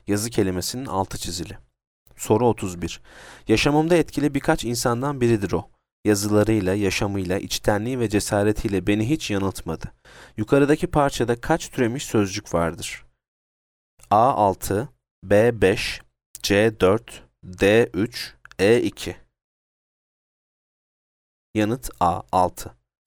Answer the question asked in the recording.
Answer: Yanıt A6.